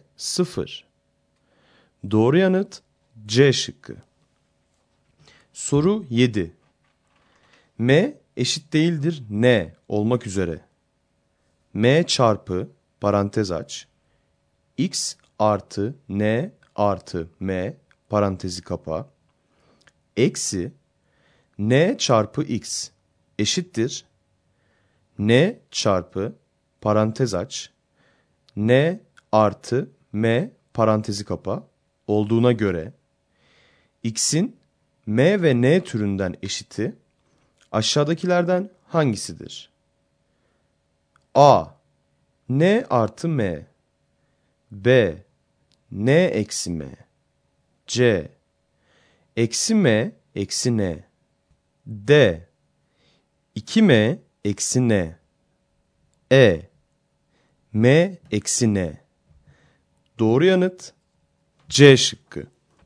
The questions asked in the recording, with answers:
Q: Eksi N çarpı X eşittir N çarpı parantez aç N artı M parantezi kapa olduğuna göre X'in M ve N türünden eşiti aşağıdakilerden hangisidir?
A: Doğru yanıt C şıkkı.